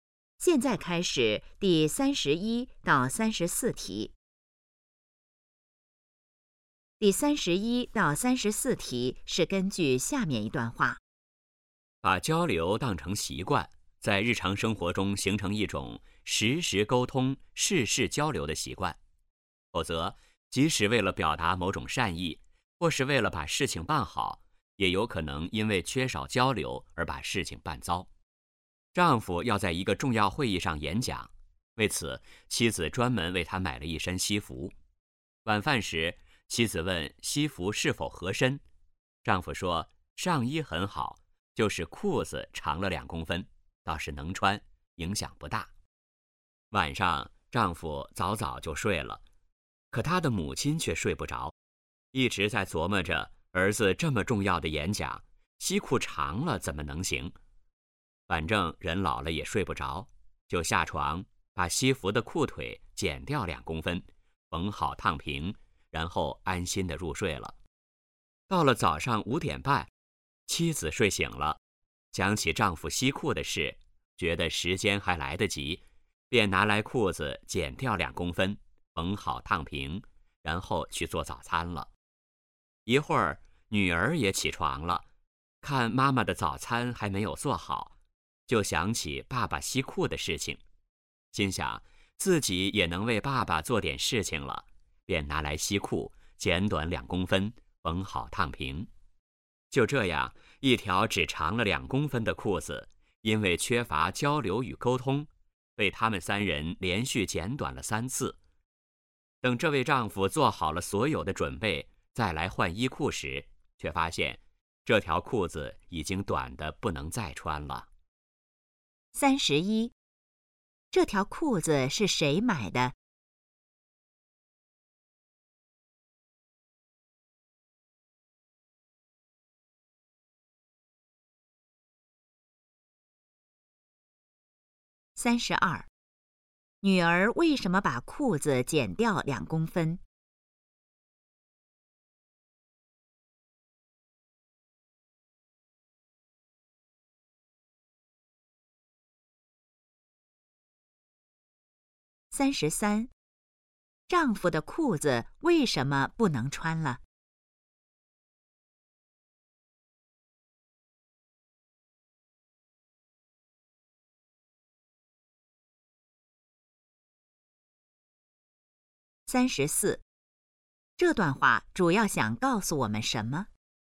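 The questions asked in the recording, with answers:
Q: 这条裤子是谁买的?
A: 妻子

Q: 女儿为什么把裤子剪掉2公分?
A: 想为爸爸做点事情

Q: 丈夫的裤子为什么不能穿了?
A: 被连续剪短了3次,太短了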